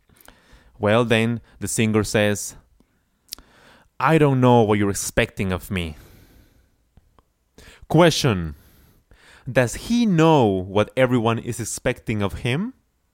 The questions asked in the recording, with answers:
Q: Does he know what everyone is expecting of him?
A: No, he doesn't. He doesn't know.